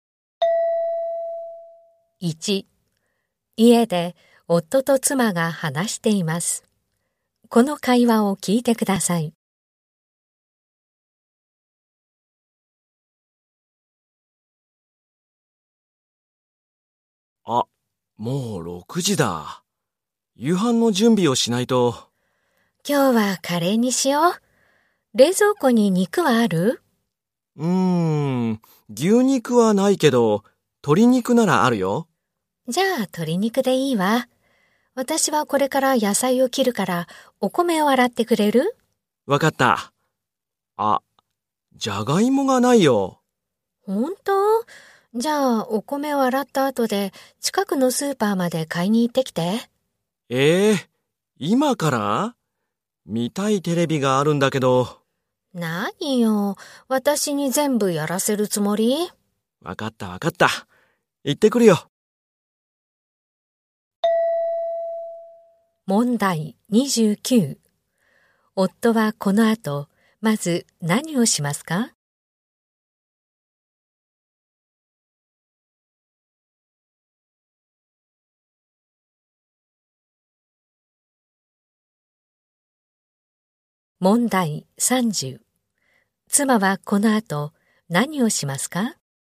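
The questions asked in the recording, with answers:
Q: 夫はこの後、まず何をしますか?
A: お米を洗う

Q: 妻はこの後、何をしますか?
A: 野菜を切る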